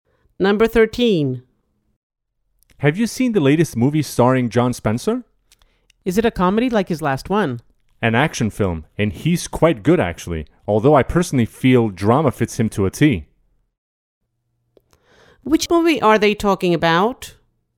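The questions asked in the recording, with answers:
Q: Which movie are they talking about?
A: an action film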